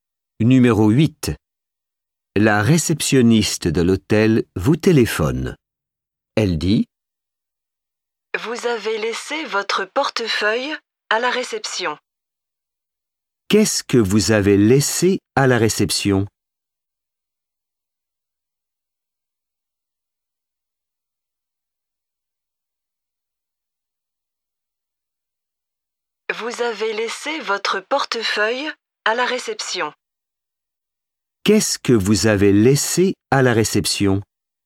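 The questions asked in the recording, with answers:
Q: Qu'est-ce que vous avez laissé à la réception?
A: Votre portefeuille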